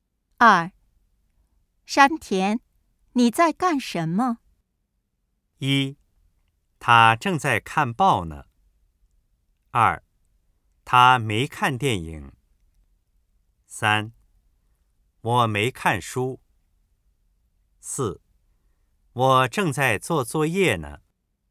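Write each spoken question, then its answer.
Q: 山田,你在干什么?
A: 四: 我正在做作业呢。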